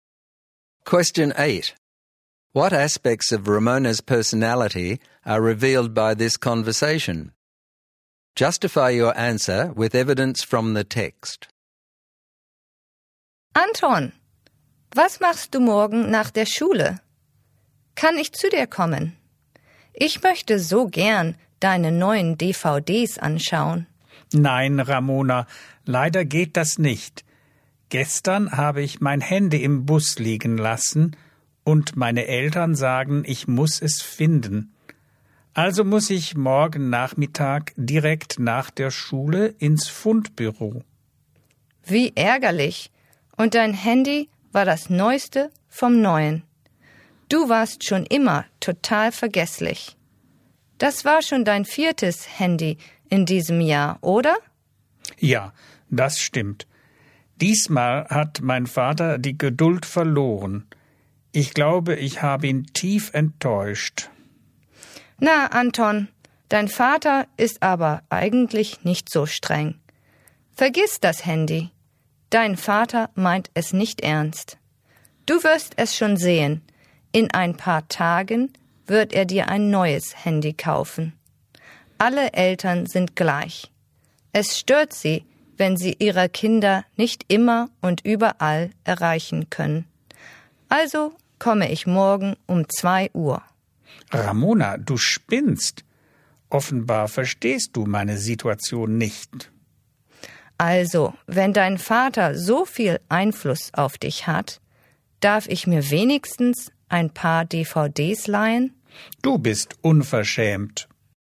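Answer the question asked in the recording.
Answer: She is selfish and insensitive/cheeky: she dismisses Anton's problem, insists on coming over, then asks to borrow his DVDs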